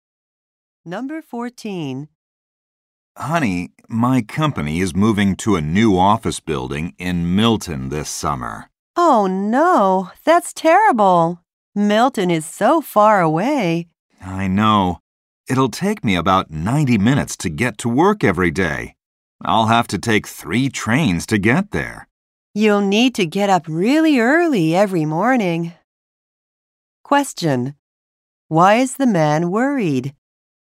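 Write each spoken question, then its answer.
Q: Why is the man worried?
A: His commute will become long, about 90 minutes with 3 trains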